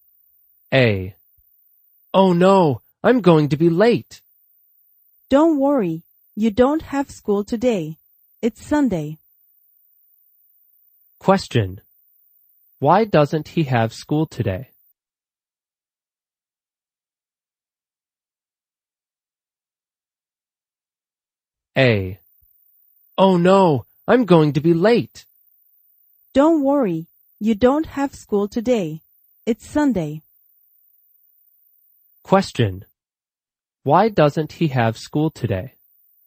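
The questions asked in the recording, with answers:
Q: Why doesn't he have school today?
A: Because it's Sunday.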